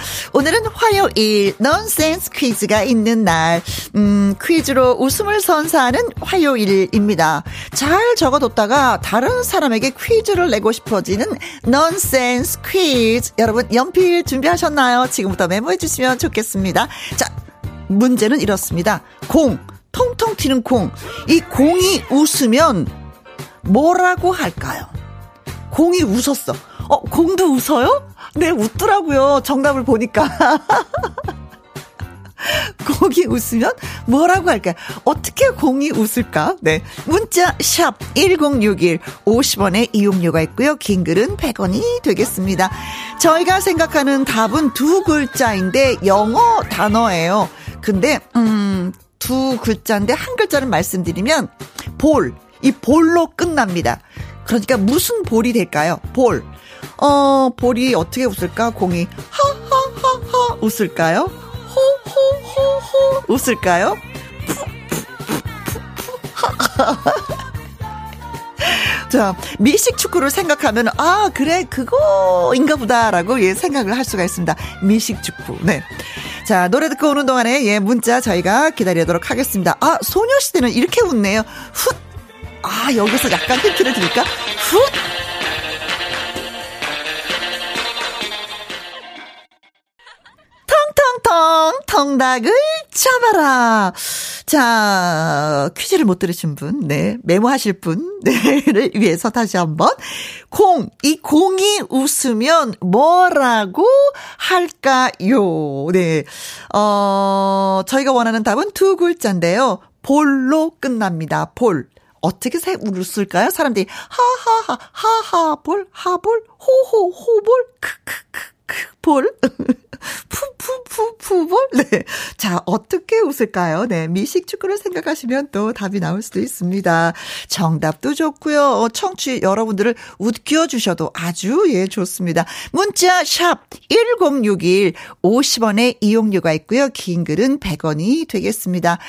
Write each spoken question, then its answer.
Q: 공이 웃으면 뭐라고 할까요?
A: 오늘의 정답은 풋볼이 정답입니다.